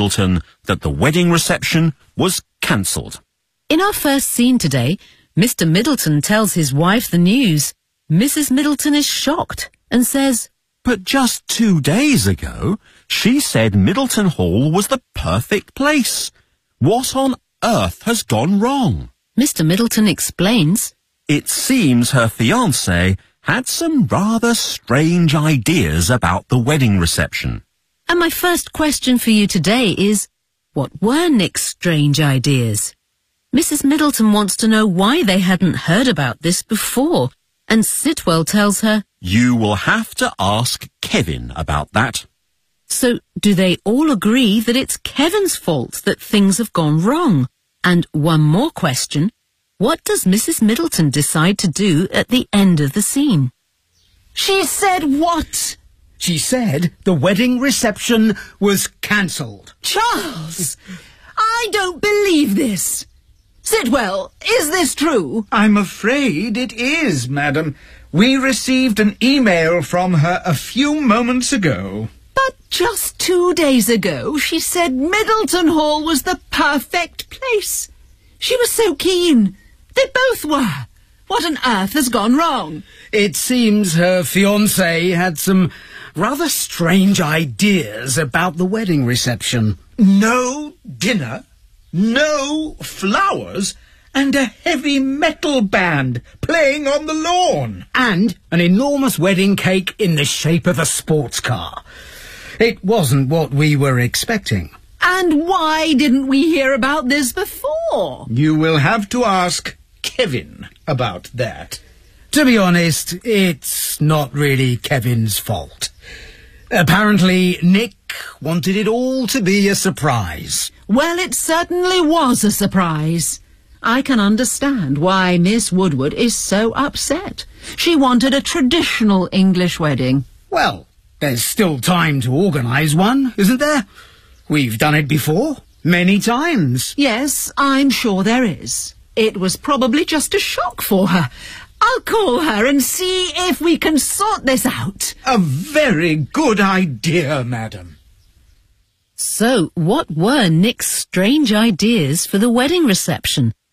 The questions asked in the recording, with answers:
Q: what were Nick's strange ideas?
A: No dinner, no flowers, and a heavy metal band playing on the lawn.

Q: So, do they all agree that it's Kevin's fault that things have gone wrong?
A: No.